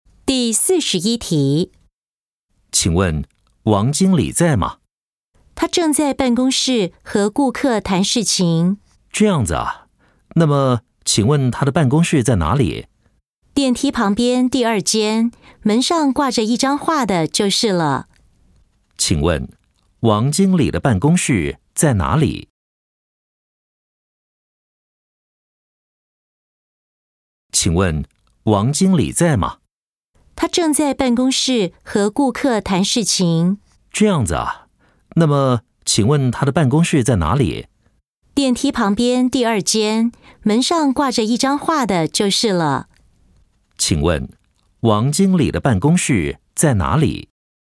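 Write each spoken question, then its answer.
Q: 请问王经理的办公室在哪里?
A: 电梯旁边第二间,门上挂着一张画的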